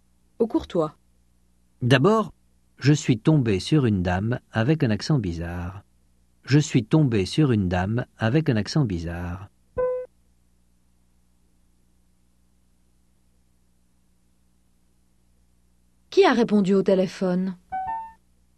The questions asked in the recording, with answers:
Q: Qui a répondu au téléphone ?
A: Une dame avec un accent bizarre.